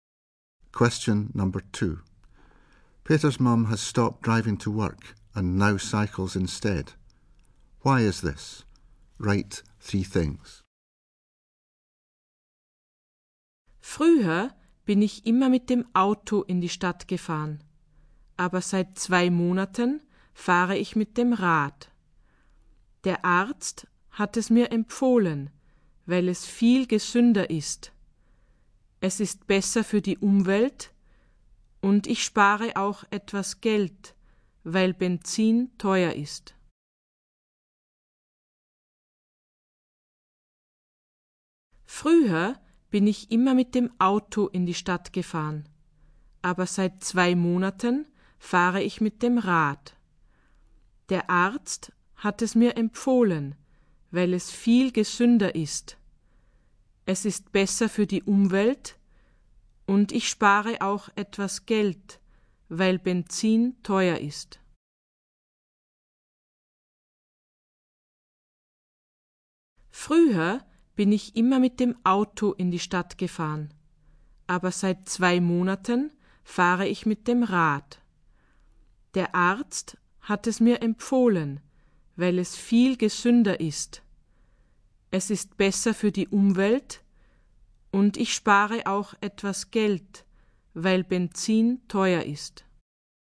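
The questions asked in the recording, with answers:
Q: Why is this? Write three things.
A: Doctor recommended it as healthier; better for the environment; saves money as petrol is expensive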